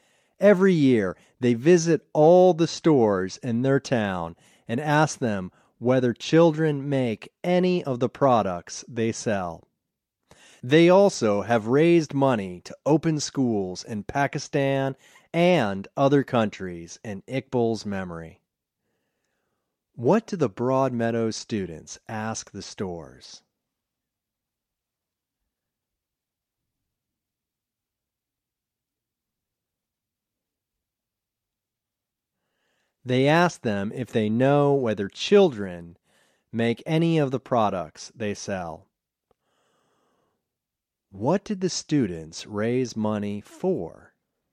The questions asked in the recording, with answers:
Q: What did the students raise money for?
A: The students raised money to open schools in Pakistan and other countries in Iqbal's memory.